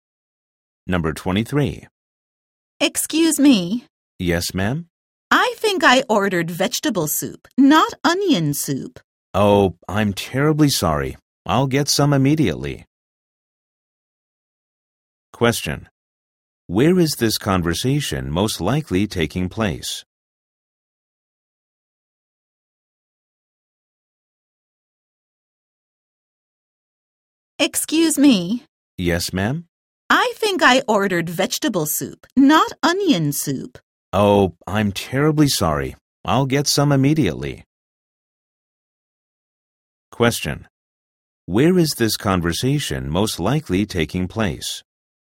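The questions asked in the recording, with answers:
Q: Where is this conversation most likely taking place?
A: At a restaurant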